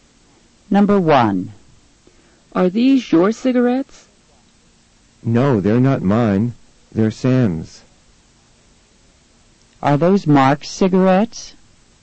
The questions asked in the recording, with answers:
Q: Are those Mark's cigarettes?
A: No, they're not Mark's. They're Sam's.